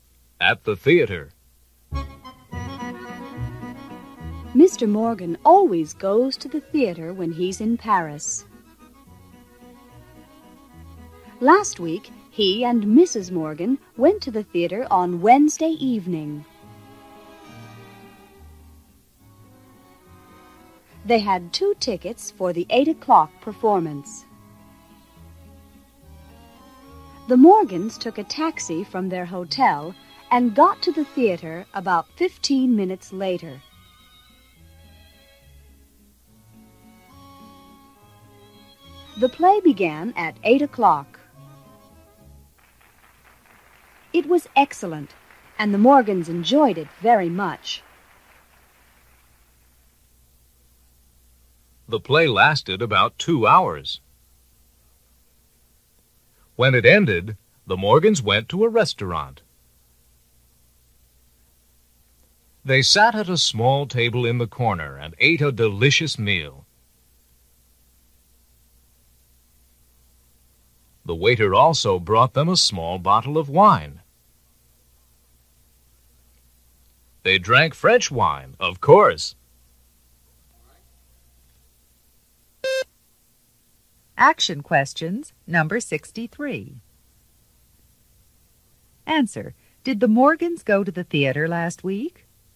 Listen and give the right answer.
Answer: Yes, they did.